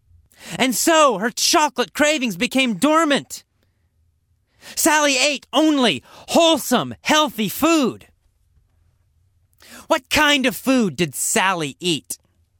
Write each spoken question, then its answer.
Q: What kind of food did Sally eat?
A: She ate only wholesome food, only healthy food, only good, healthy food.